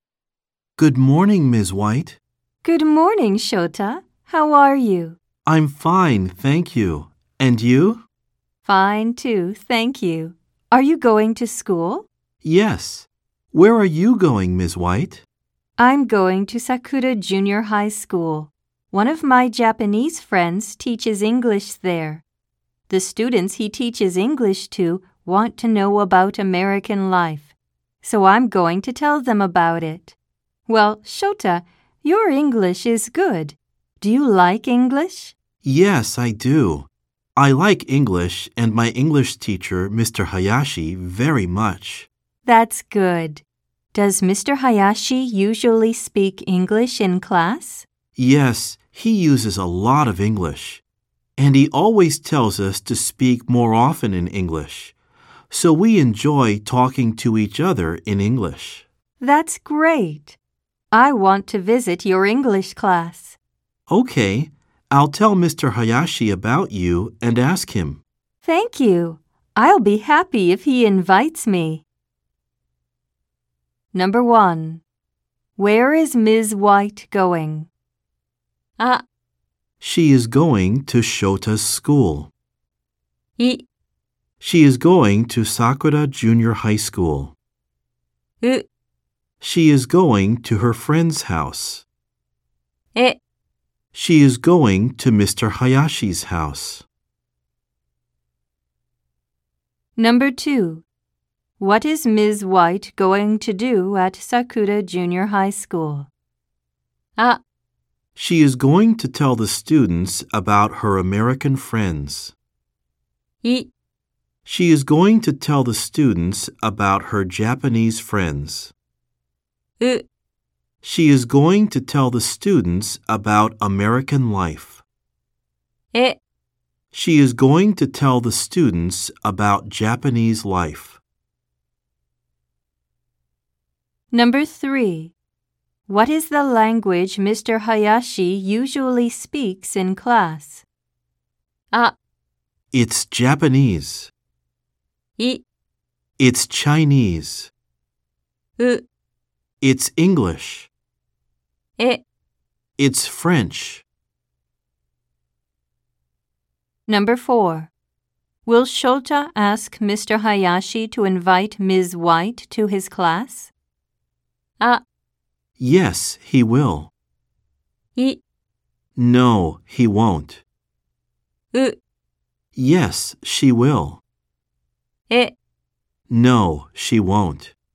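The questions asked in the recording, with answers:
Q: Where is Ms. White going?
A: い: She is going to Sakura Junior High School.

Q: What is Ms. White going to do at Sakura Junior High School?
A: う: She is going to tell the students about American life.

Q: What is the language Mr. Hayashi usually speaks in class?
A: う: It's English.

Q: Will Shota ask Mr. Hayashi to invite Ms. White to his class?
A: あ: Yes, he will.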